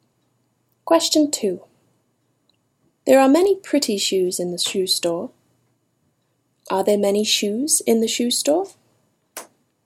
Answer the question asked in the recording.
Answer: Yes. There are many pretty shoes in the shoe store.